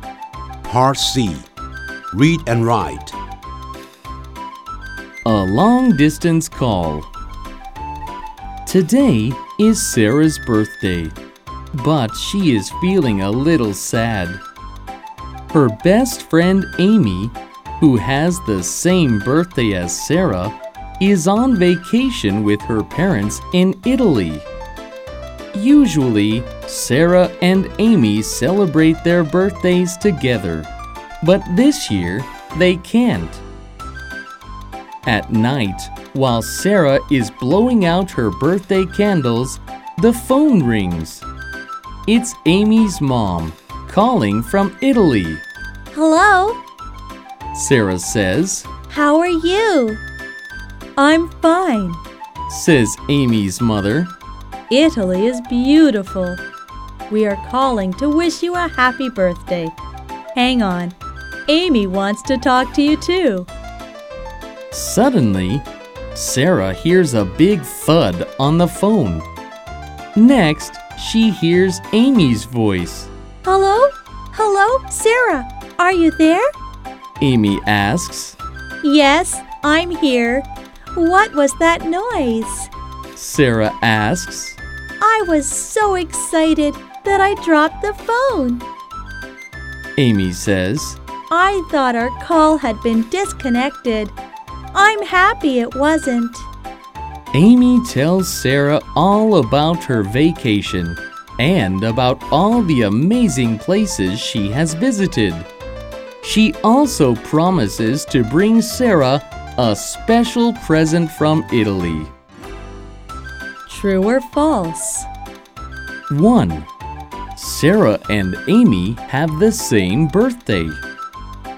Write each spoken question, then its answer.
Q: Sarah and Amy have the same birthday.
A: True.